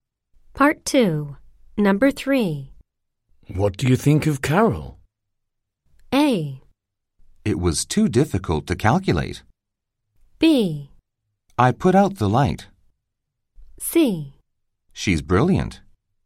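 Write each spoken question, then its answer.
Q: What do you think of Carol?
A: C: She's brilliant.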